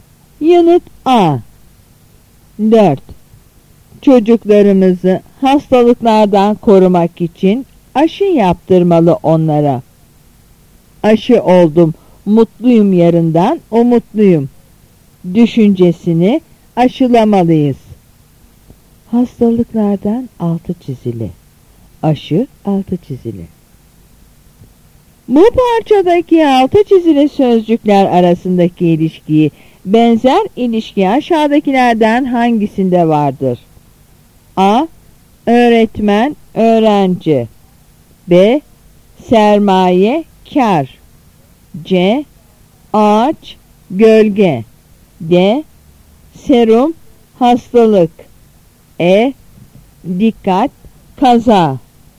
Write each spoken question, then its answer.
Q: Bu parçadaki altı çizili sözcükler arasındaki ilişkiyi, benzer ilişki aşağıdakilerden hangisinde vardır?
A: Yanıt E.